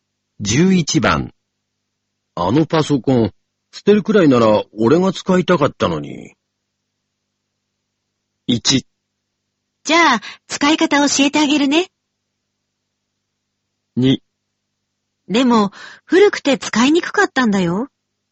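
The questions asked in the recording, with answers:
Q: 捨てるくらいなら俺が使いたかったのに。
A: 2: でも、古くて使いにくかったんだよ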